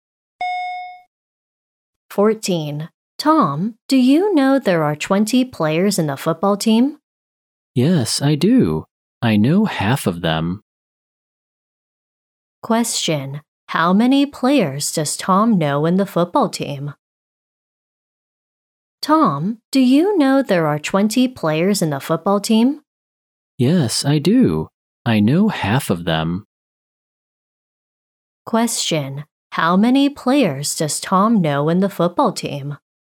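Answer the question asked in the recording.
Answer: 10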